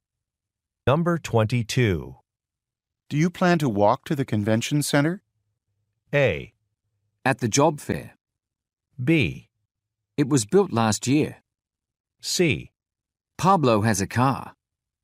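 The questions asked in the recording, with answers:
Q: Do you plan to walk to the convention center?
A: C: Pablo has a car.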